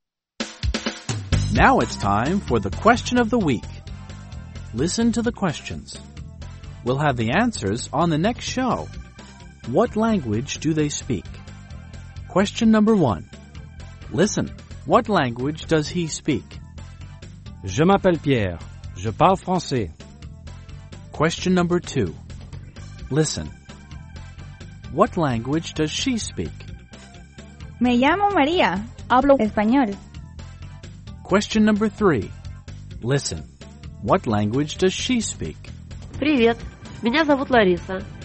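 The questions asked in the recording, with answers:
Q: Listen, what language does he speak?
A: French

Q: Listen. What language does she speak?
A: Spanish

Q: What language does she speak?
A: Russian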